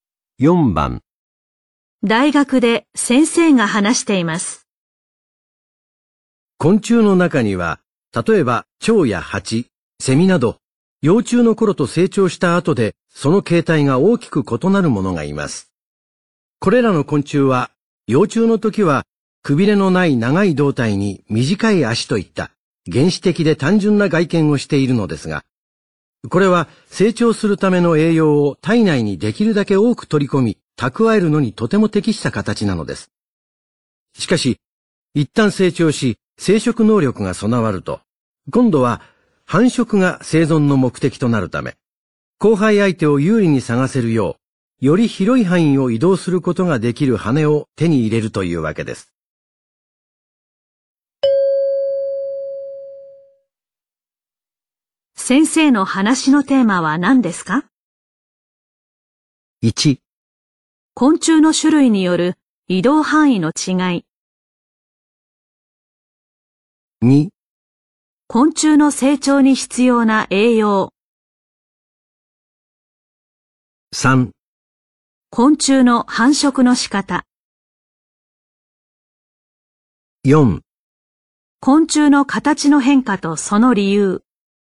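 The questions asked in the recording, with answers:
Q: 先生の話のテーマは何ですか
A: 4: 昆虫の形の変化とその理由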